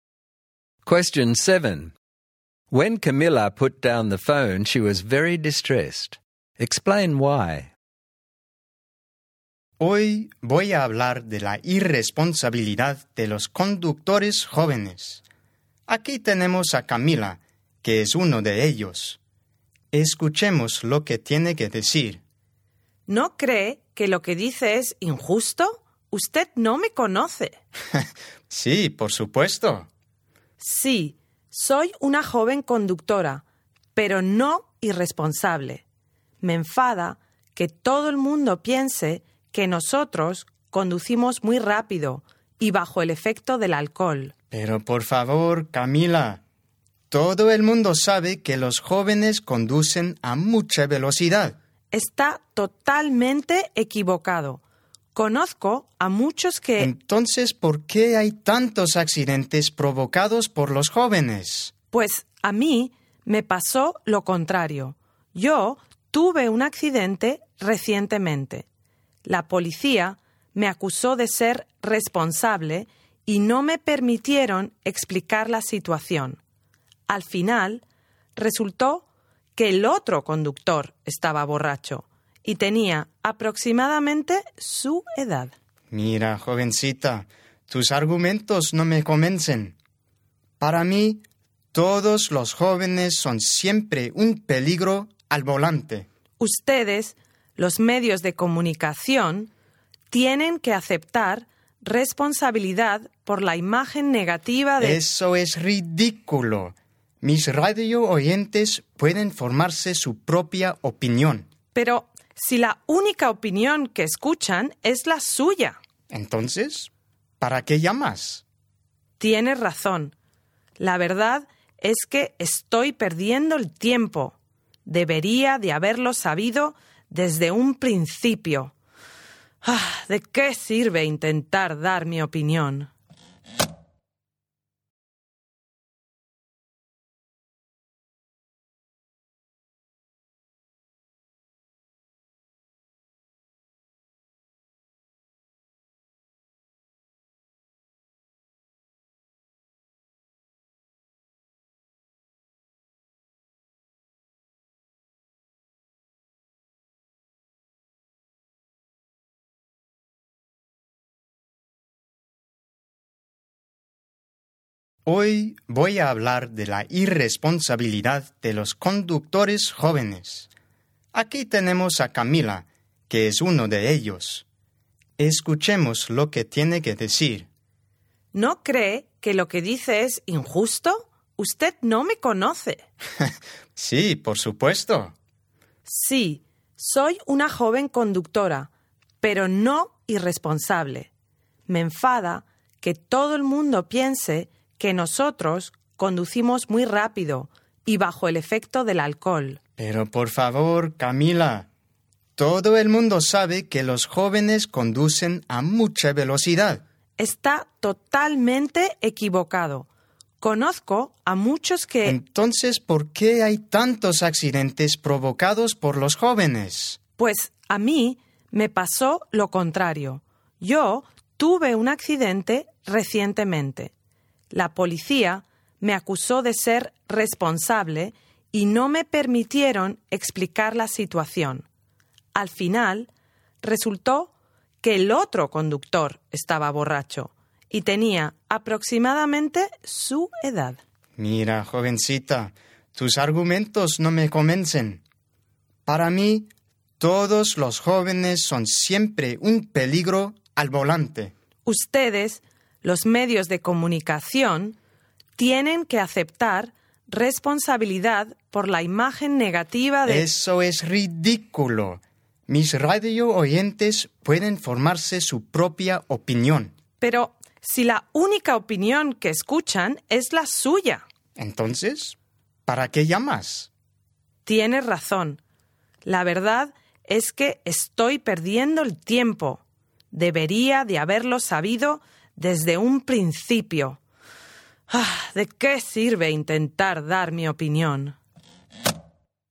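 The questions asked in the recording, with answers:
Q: When Camilla put down the phone, she was very distressed.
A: The radio host stereotyped all young drivers as irresponsible and dangerous, and wouldn't listen to her or accept her argument (including her unfair accident experience), so she felt calling was a waste of time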